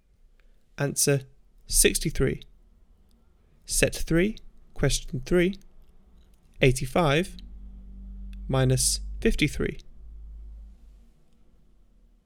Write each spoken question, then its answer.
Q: 85 minus 53.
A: Answer 32.